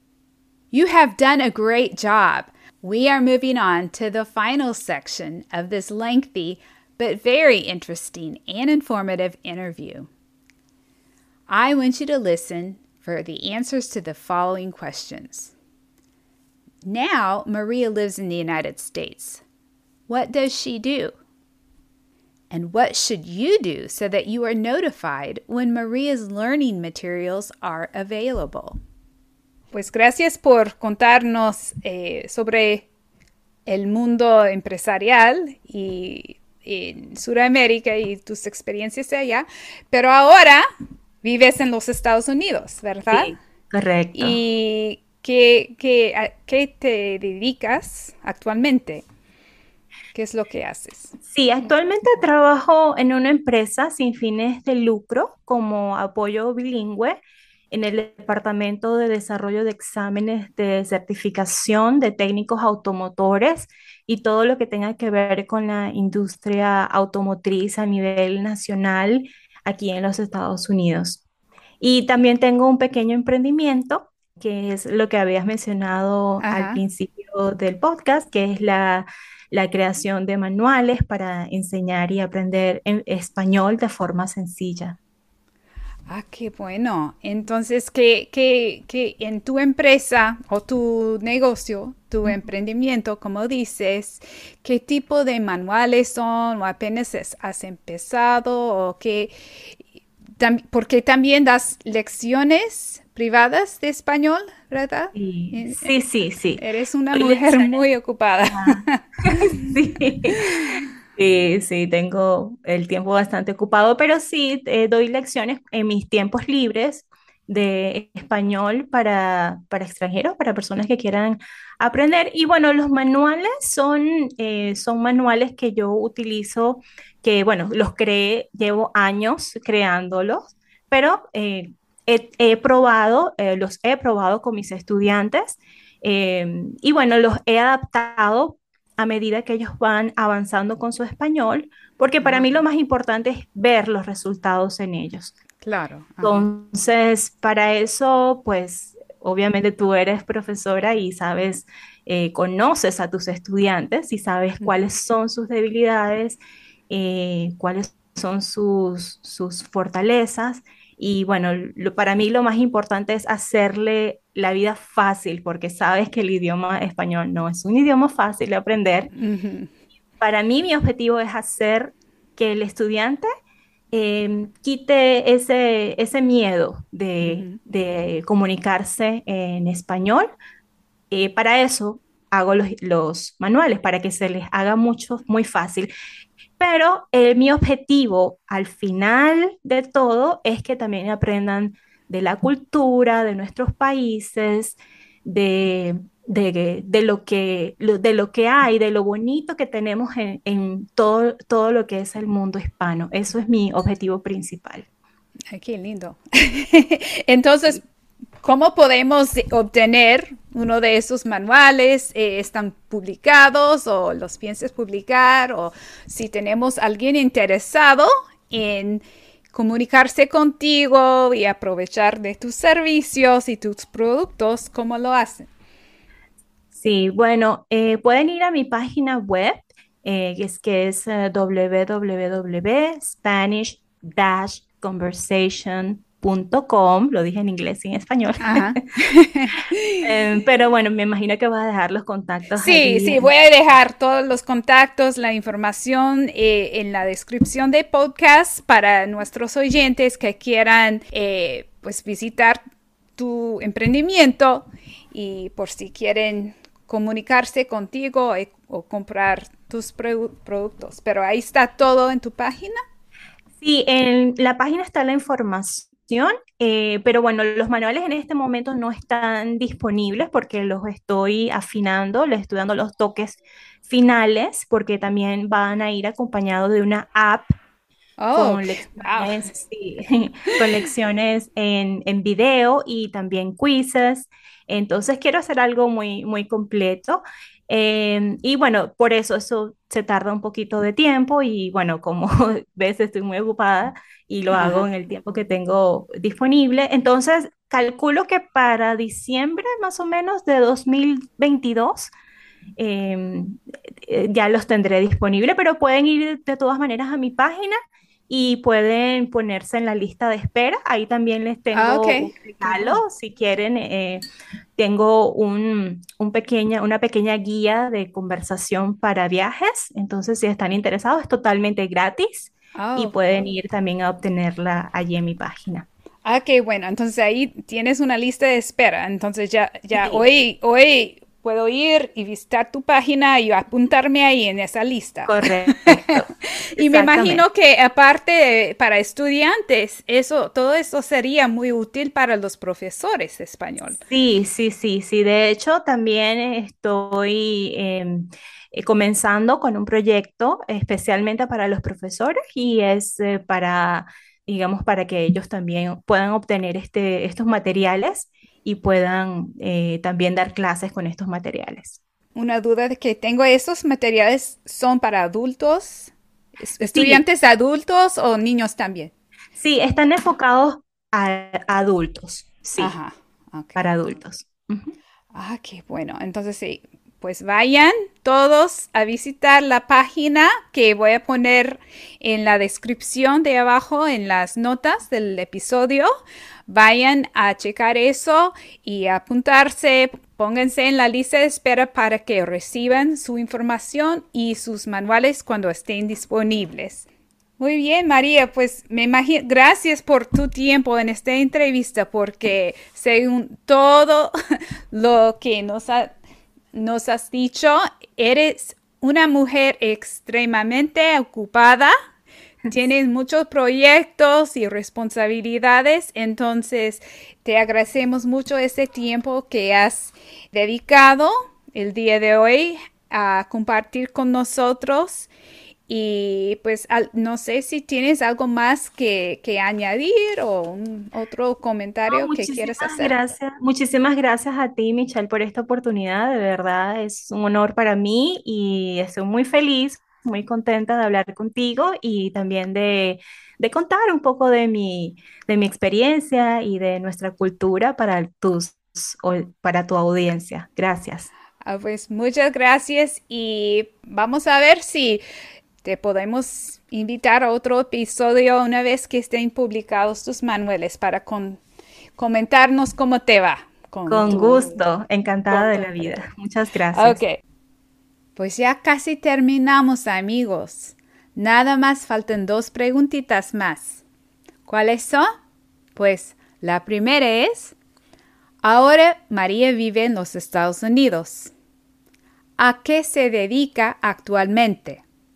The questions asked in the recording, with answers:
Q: ¿A qué se dedica actualmente?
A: María trabaja en una empresa sin fines de lucro como apoyo bilingüe en el Departamento de Desarrollo de Exámenes de Certificación de Técnicos Automotores

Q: And what should you do so that you are notified when Maria's learning materials are available?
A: Pues deberías visitar su página web